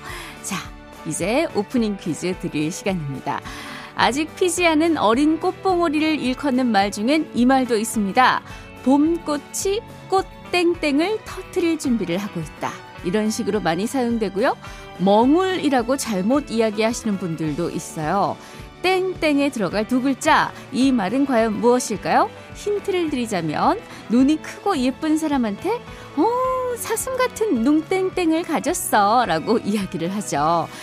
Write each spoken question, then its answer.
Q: 땡땡에 들어갈 두 글자 이 말은 과연 무엇일까요?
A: 오프닝 퀴즈 정답은 망울입니다.